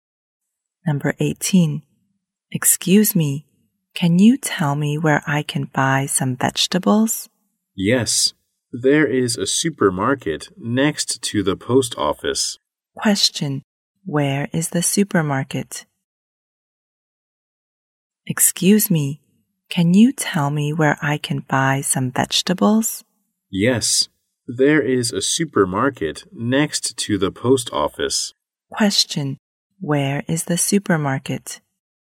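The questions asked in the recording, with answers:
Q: Where is the supermarket?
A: Next to the post office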